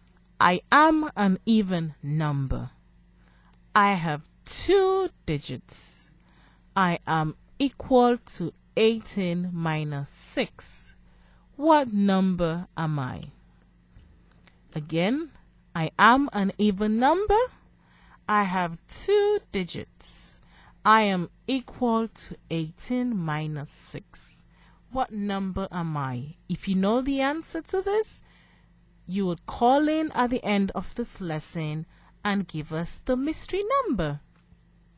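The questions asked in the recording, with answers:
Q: What number am I?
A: 12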